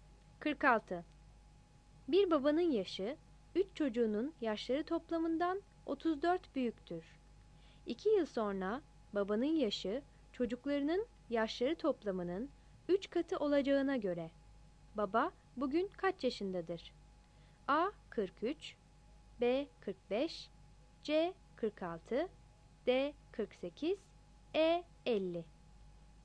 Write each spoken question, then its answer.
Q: 2 yıl sonra babanın yaşı çocuklarının yaşları toplamının 3 katı olacağına göre baba bugün kaç yaşındadır?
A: 46 A